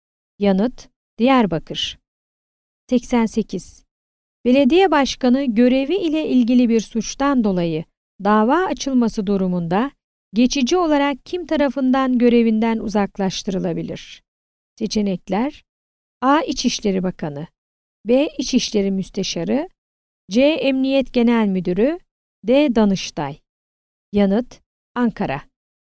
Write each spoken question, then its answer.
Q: Belediye başkanı görevi ile ilgili bir suçtan dolayı dava açılması durumunda geçici olarak kim tarafından görevinden uzaklaştırılabilir?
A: Yanıt: Ankara.